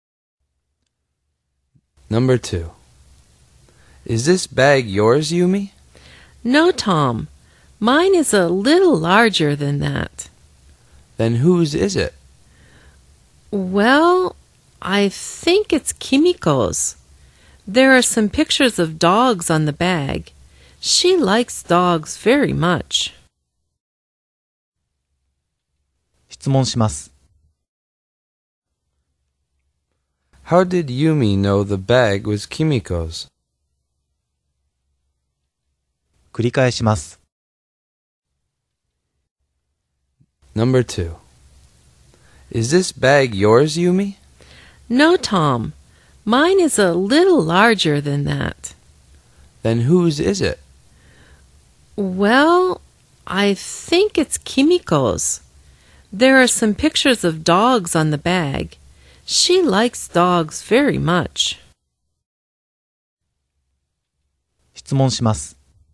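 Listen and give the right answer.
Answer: There are pictures of dogs on it, and Kimiko likes dogs.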